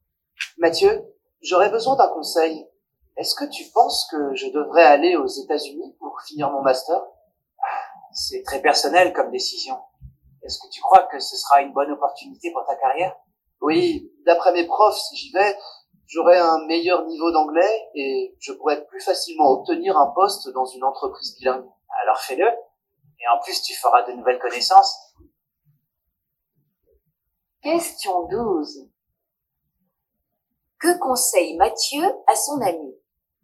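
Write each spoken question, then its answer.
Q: Que conseille Mathieu à son ami?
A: D'aller aux États-Unis pour finir son master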